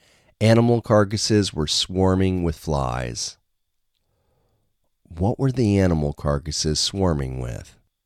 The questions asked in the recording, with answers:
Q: What were the animal carcasses swarming with?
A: The animal carcasses were swarming with flies.